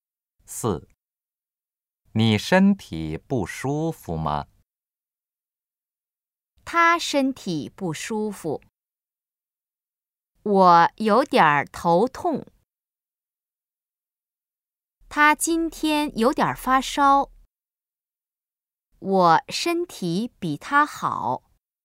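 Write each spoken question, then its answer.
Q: 你身体不舒服吗?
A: 我有点头痛。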